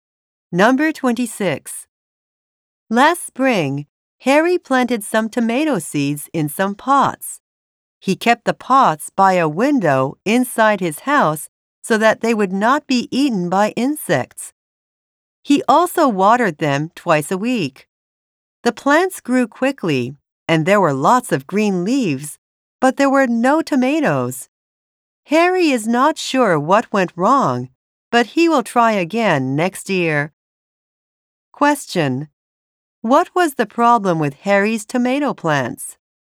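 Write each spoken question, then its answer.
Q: What was the problem with Harry's tomato plants?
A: They grew leaves but produced no tomatoes.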